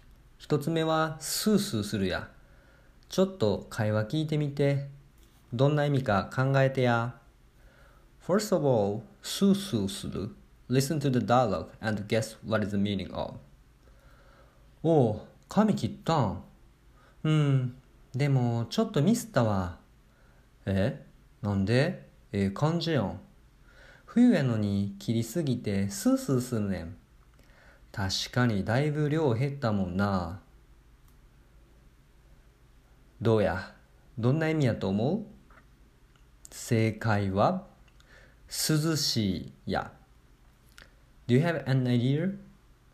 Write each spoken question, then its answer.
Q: どうやどんな意味やと思う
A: 正解は涼しいや